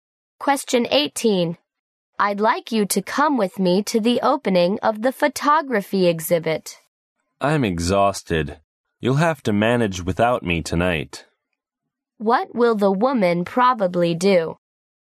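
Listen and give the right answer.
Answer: Not go to the exhibit; stay and rest.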